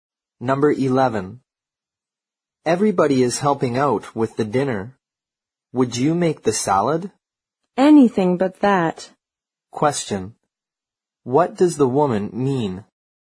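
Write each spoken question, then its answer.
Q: What does the woman mean?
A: She doesn't want to make the salad.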